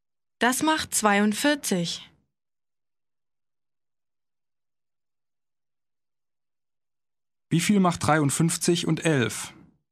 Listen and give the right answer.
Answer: 64. Das macht 64.